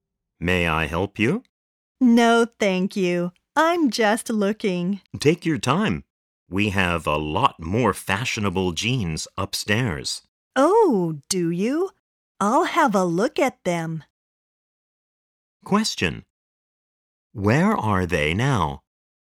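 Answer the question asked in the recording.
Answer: In a clothes shop (store)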